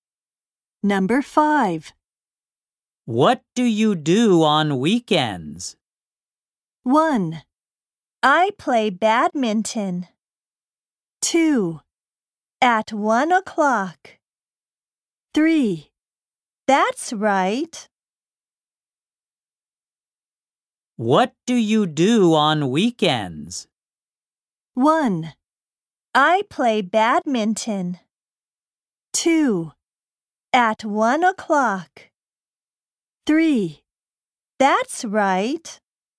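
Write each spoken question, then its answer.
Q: What do you do on weekends?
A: 1: I play badminton.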